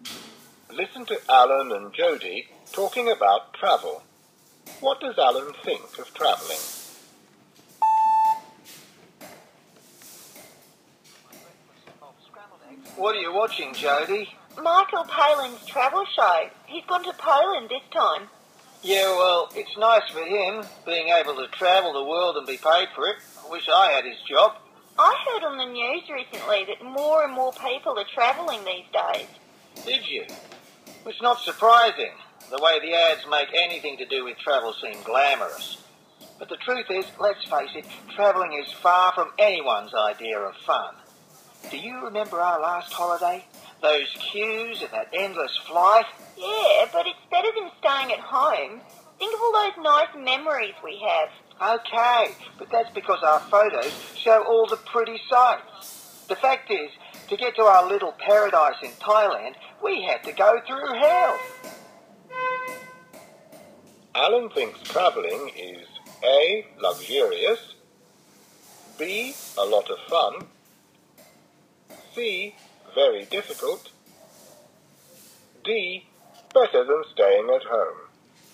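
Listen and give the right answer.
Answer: C: very difficult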